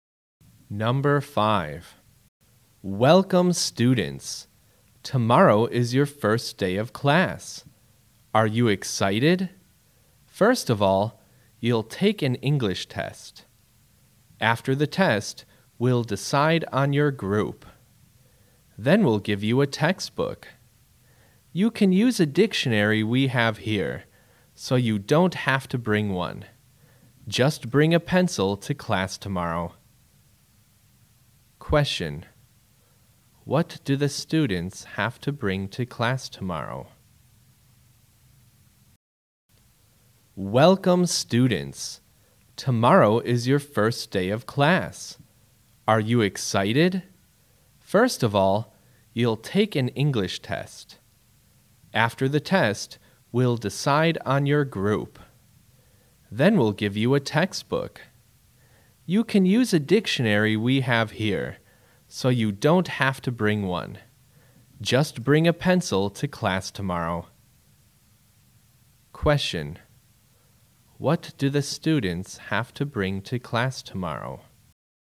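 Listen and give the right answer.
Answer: A pencil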